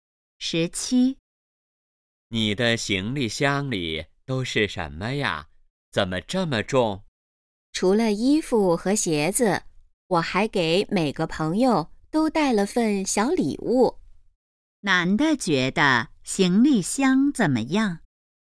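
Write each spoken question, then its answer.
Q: 男的觉得行李箱怎么样?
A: 很重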